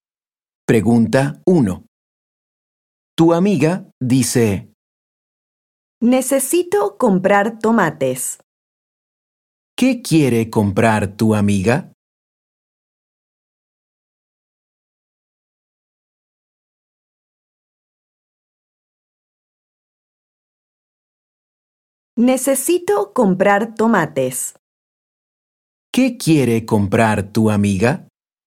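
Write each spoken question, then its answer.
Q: ¿Qué quiere comprar tu amiga?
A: tomates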